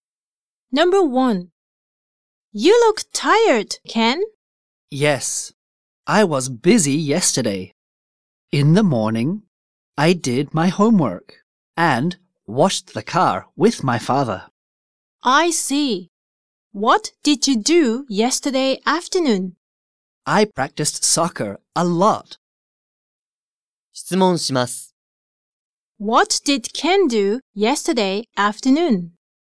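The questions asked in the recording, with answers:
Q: What did Ken do yesterday afternoon?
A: He practiced soccer a lot.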